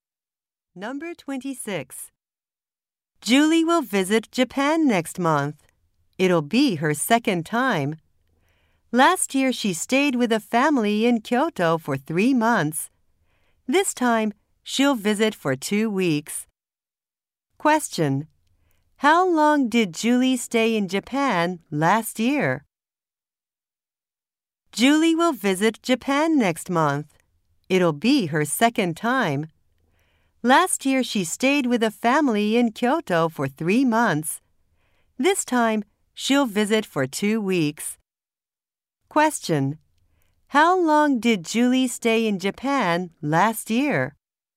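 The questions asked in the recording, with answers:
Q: How long did Julie stay in Japan last year?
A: For three months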